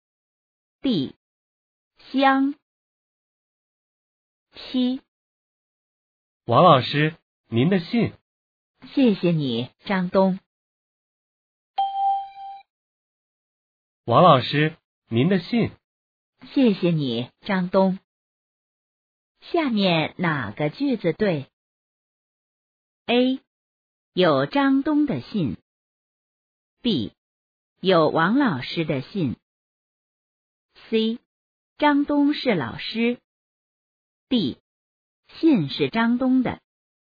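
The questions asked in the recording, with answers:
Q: 下面哪个句子对?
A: B: 有王老师的信。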